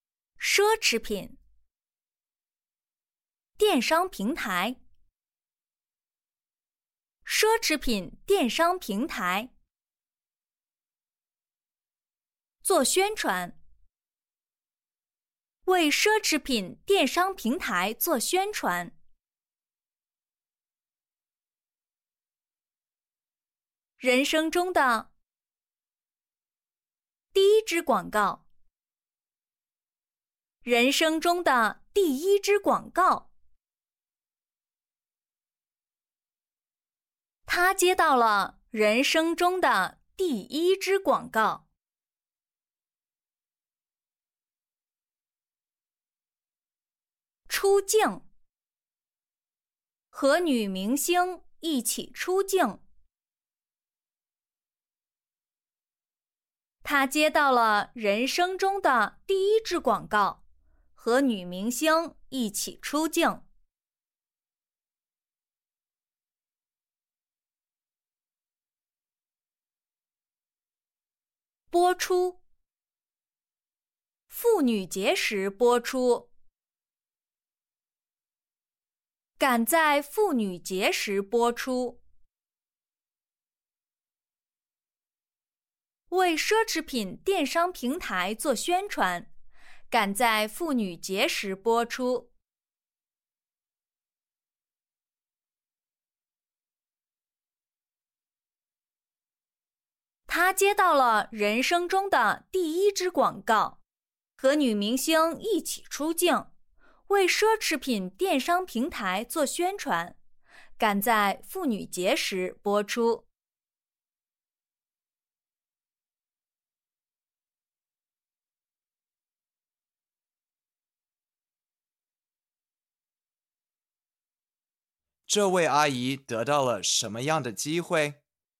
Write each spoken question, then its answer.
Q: 这位阿姨得到了什么样的机会?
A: 她接到了人生中的第一支广告,和女明星一起出镜,为奢侈品电商平台做宣传,赶在妇女节时播出。